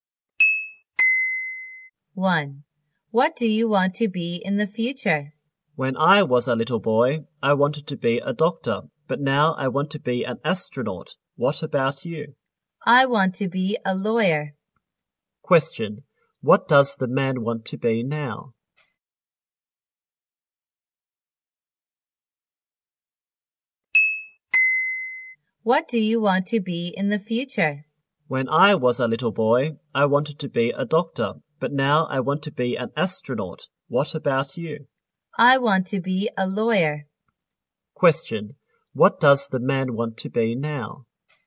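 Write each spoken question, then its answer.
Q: What does the man want to be now?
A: An astronaut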